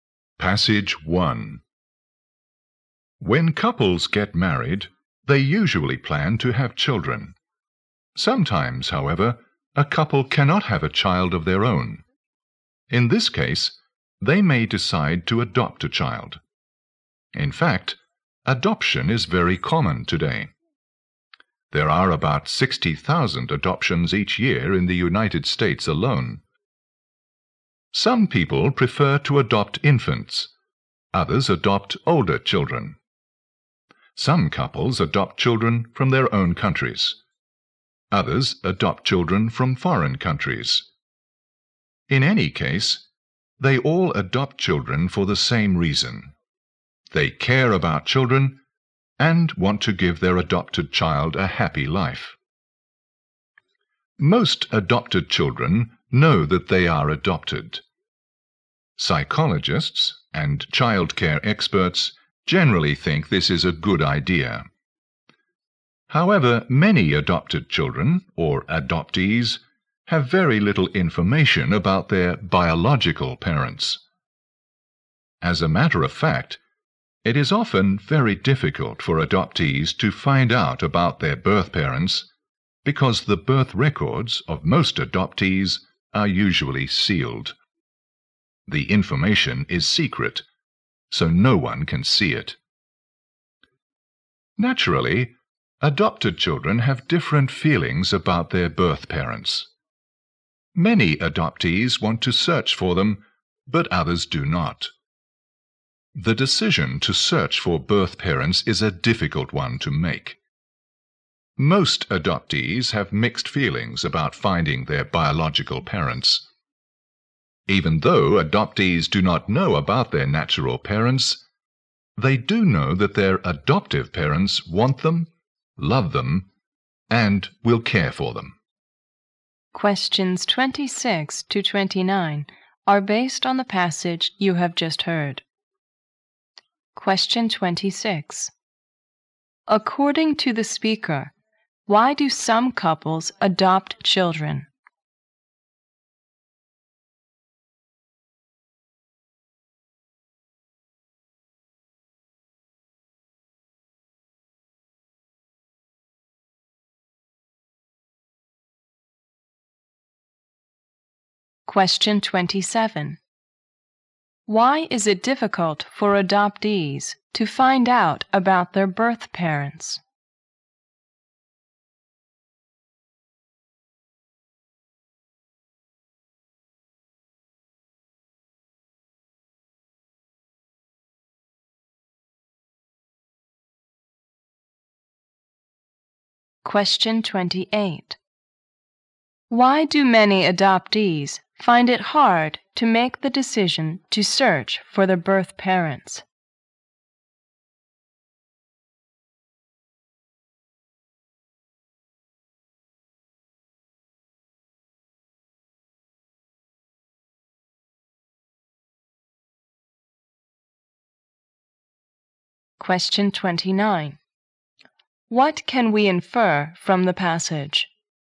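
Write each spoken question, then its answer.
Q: According to the speaker, why do some couples adopt children?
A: They care about children and want to give them a happy life.

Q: Why is it difficult for adoptees to find out about their birth parents?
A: Their birth records are usually sealed.

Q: Why do many adoptees find it hard to make the decision to search for their birth parents?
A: They have mixed feelings about finding them.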